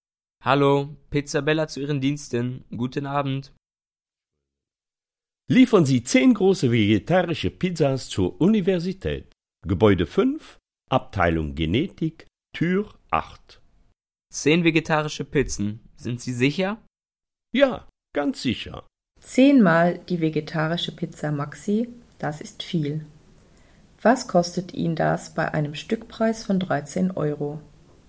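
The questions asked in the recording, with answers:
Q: Was kostet Ihnen das bei einem Stückpreis von 13 Euro?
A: 130 Euro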